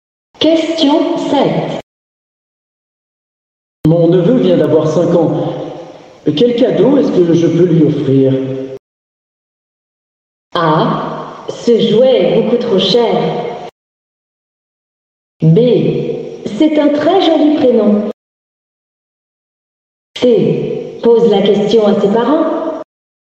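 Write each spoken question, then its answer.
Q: Quel cadeau est-ce que je peux lui offrir?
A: C: Pose la question à ses parents.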